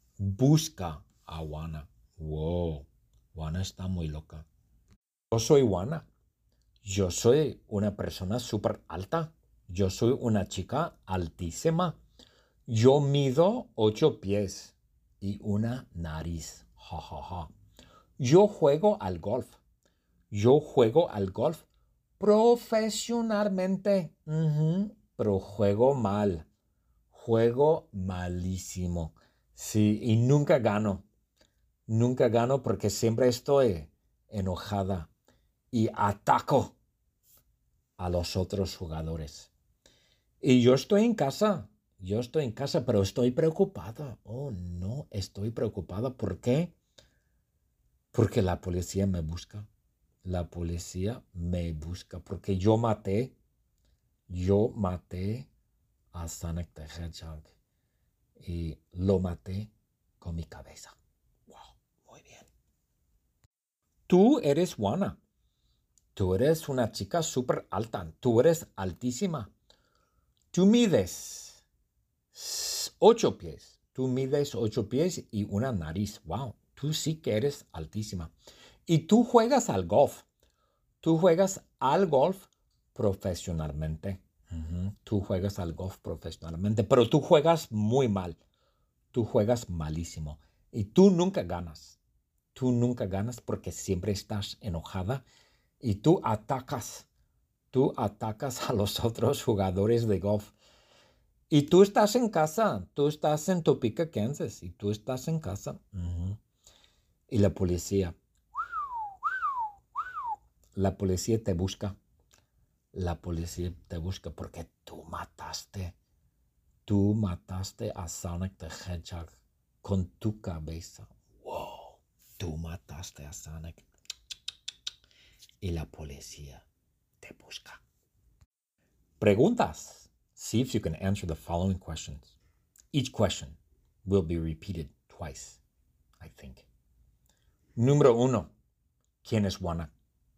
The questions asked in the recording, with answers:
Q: ¿Quién es Juana?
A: Juana es una chica altísima.